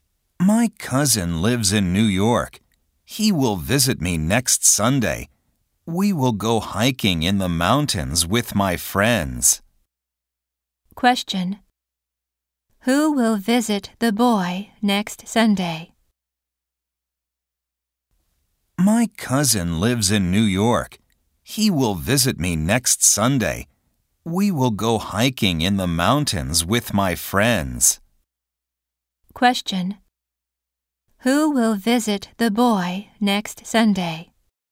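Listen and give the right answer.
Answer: His cousin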